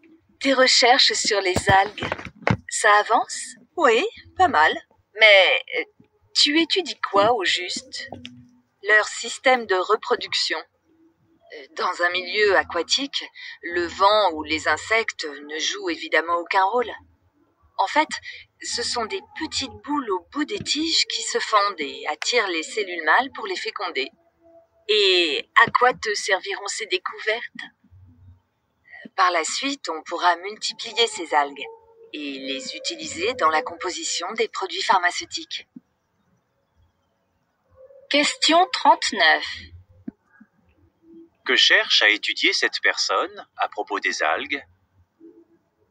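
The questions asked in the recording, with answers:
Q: Que cherche à étudier cette personne à propos des algues?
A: Leur système de reproduction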